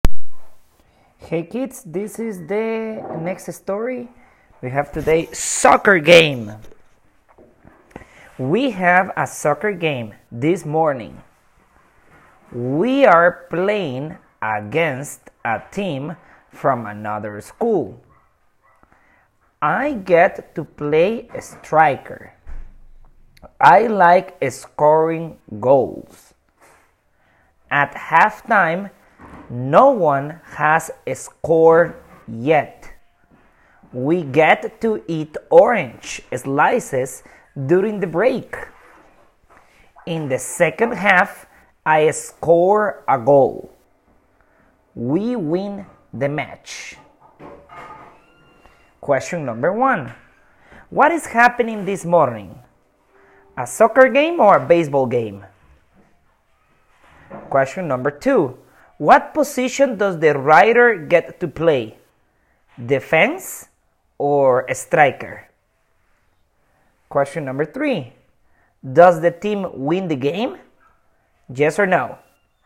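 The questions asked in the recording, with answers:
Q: What is happening this morning?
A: A soccer game

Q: what position does the rider get to play?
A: Striker

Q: Does the team win the game?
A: Yes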